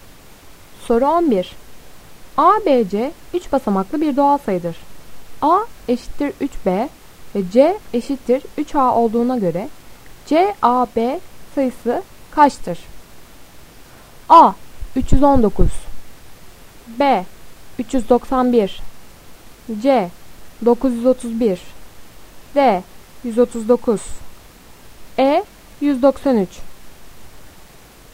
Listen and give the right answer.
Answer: Doğru cevap C 931.